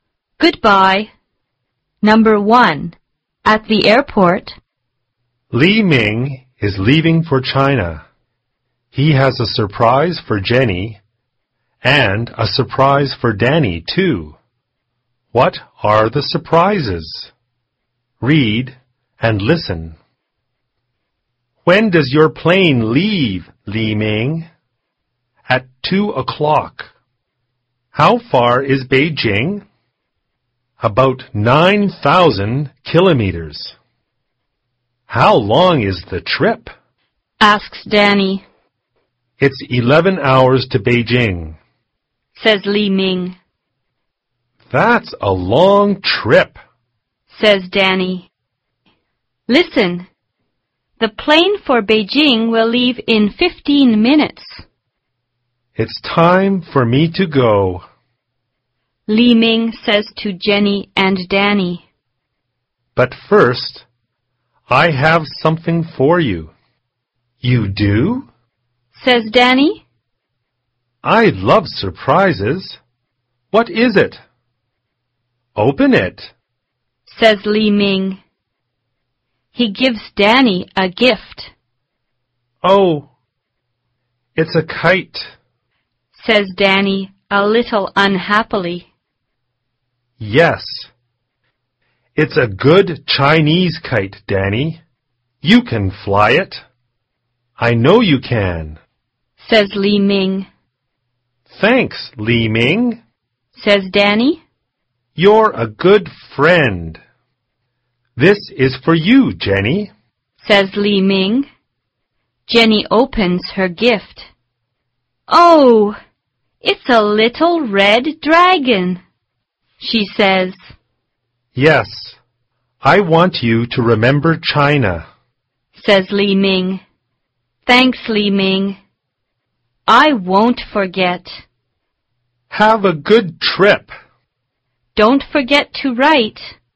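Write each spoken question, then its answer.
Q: What are the surprises?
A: A Chinese kite for Danny and a little red dragon for Jenny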